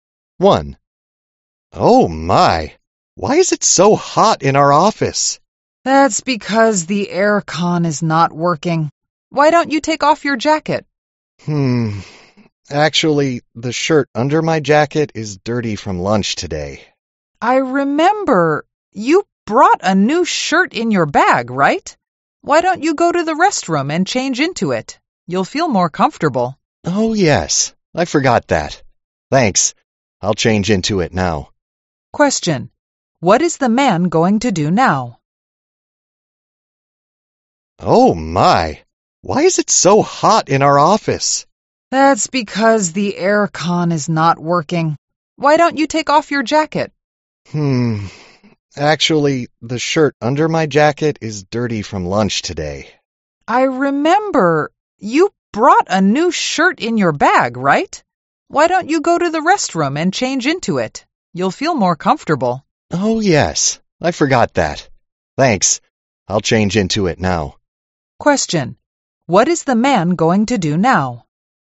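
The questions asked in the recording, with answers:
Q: Question, what is the man going to do now?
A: Go to the restroom and change into the new shirt from his bag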